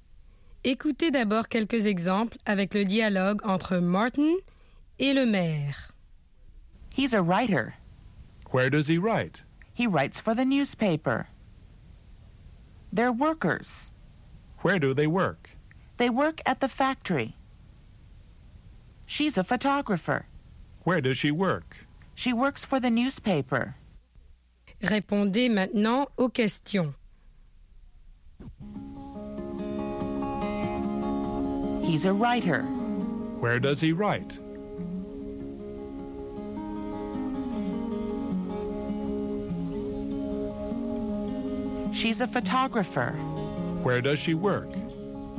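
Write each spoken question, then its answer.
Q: Where does he write?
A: He writes for the newspaper.

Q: Where does she work?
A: She works for the newspaper.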